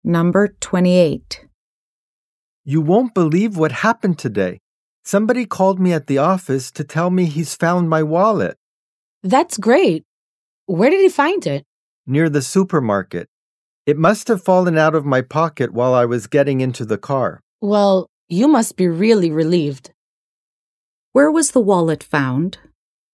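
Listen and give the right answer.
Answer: Near the supermarket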